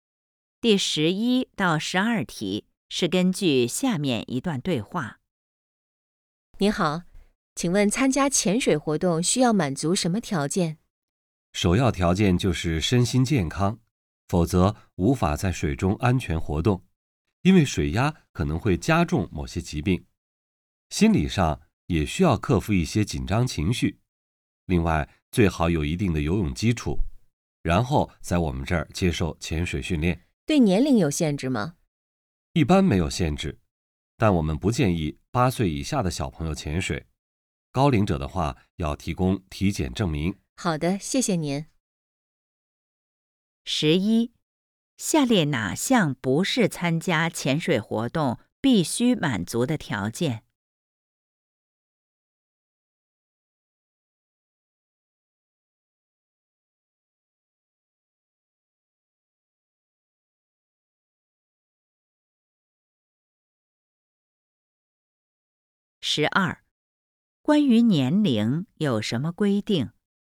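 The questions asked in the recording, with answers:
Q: 关于年龄有什么规定?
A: 一般没有限制,但不建议八岁以下儿童潜水,高龄者要提供体检证明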